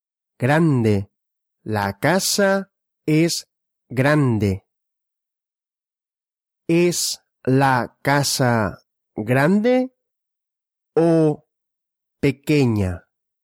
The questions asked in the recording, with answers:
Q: ¿Es la casa grande o pequeña?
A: grande. La casa es grande.